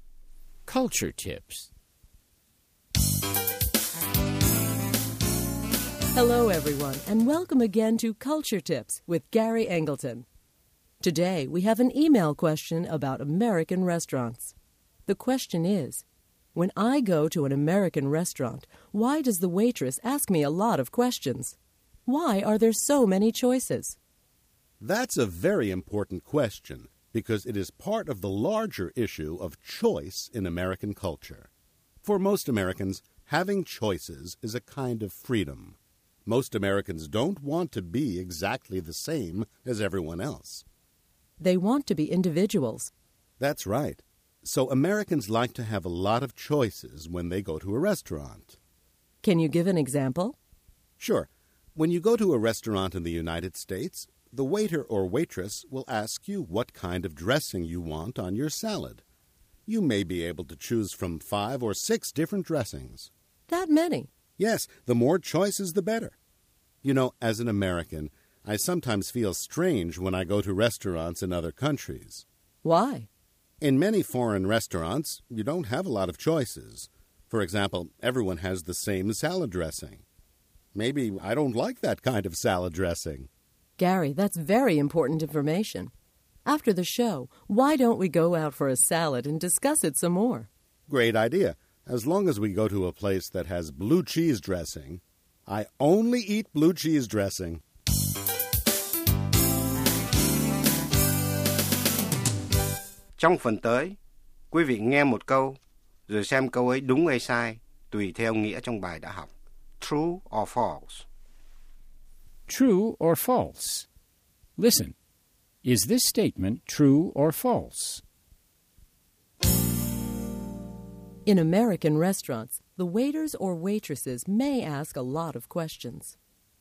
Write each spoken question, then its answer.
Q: In American restaurants, the waiters or waitresses may ask a lot of questions.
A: True. For example, they may ask what kind of salad dressing you want.